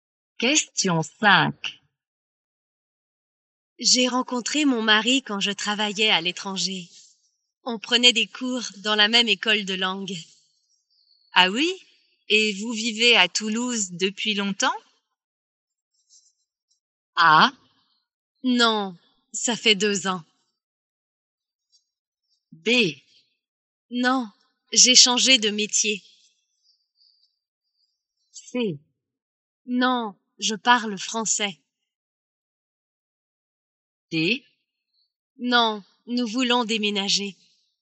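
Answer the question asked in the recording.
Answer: A: Non, ça fait 2 ans.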